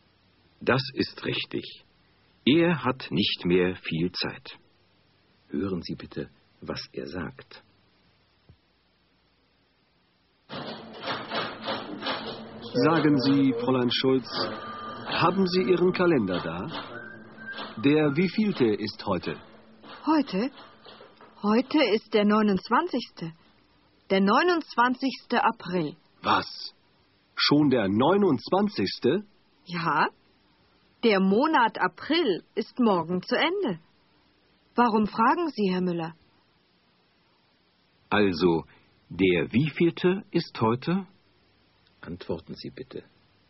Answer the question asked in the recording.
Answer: Heute ist der 29. April.